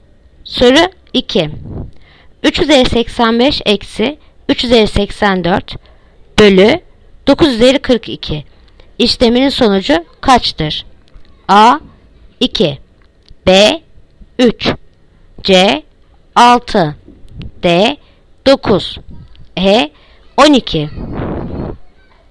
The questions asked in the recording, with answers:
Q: 385 eksi 3 üzeri 84 bölü 9 üzeri 42 işleminin sonucu kaçtır?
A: Yanıt Adana 2.